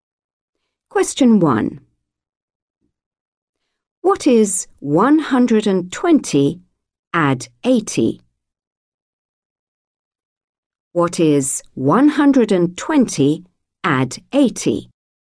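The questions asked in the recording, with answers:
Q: What is 120 add 80?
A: 200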